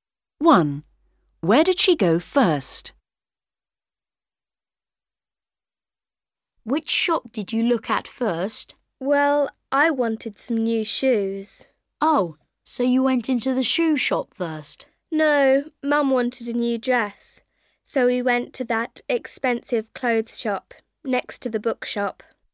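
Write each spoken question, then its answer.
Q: Where did she go first?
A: the clothes shop (next to the bookshop)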